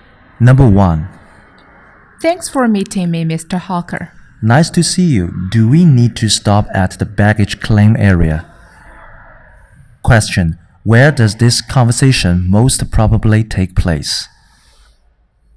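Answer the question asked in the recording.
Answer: At an airport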